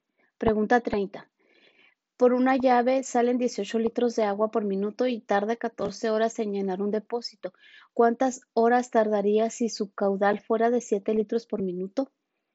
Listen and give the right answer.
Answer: Y la respuesta correcta es C36.